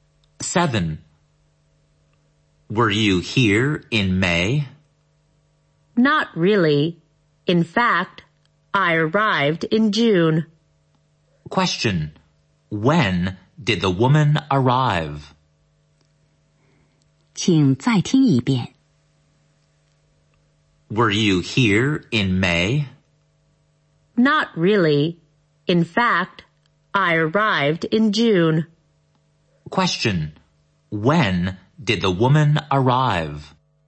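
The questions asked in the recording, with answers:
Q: Question,When did the woman arrive?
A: In June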